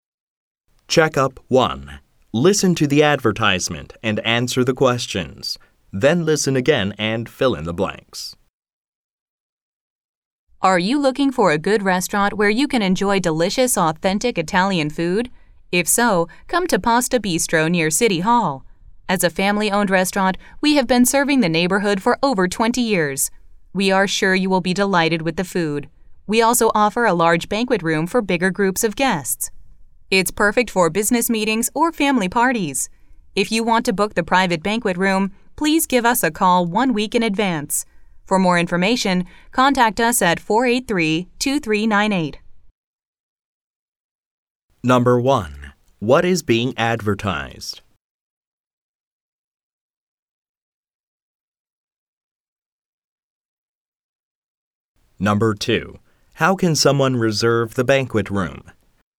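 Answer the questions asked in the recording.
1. An Italian restaurant (Pasta Bistro)
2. By calling one week in advance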